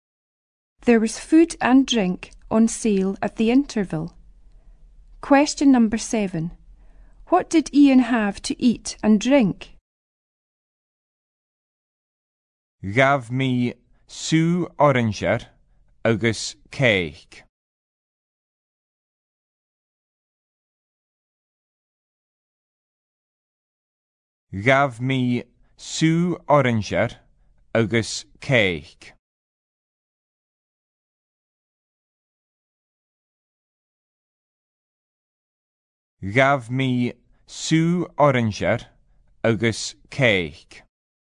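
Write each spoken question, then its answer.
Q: What did Ian have to eat and drink?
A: Orange juice and cake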